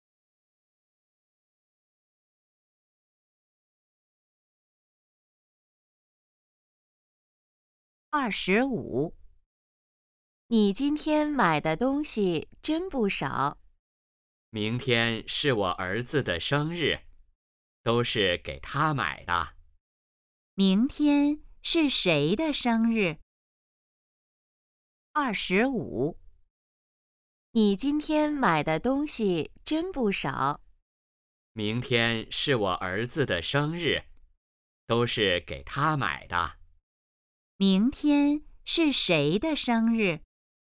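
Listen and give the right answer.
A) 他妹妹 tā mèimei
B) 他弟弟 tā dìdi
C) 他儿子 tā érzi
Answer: C) 他儿子 tā érzi

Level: HSK2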